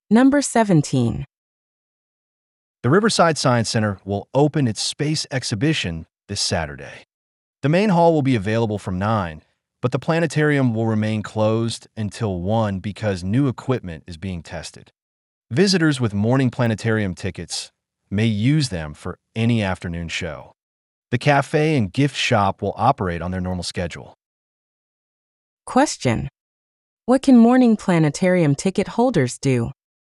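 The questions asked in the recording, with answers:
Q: what can morning planetarium ticket holders do?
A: Use their tickets for any afternoon show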